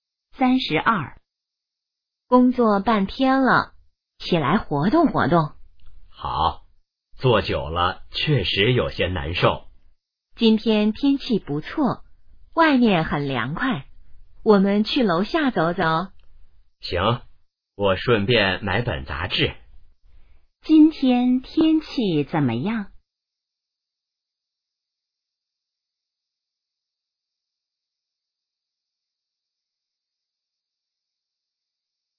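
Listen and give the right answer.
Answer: 不错,很凉快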